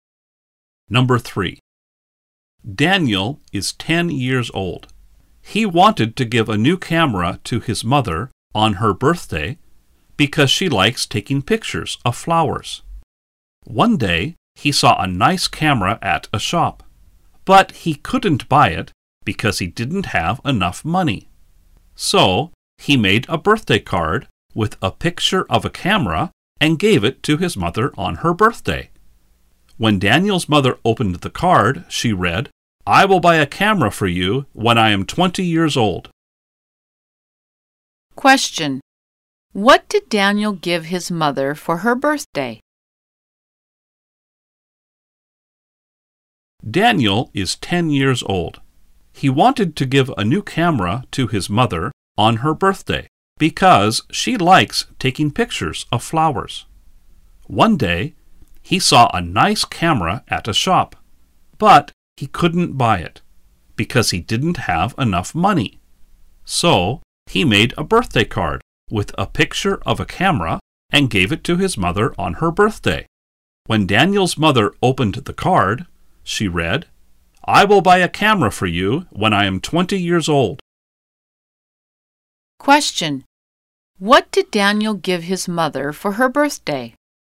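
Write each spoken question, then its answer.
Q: What did Daniel give his mother for her birthday?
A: A birthday card with a picture of a camera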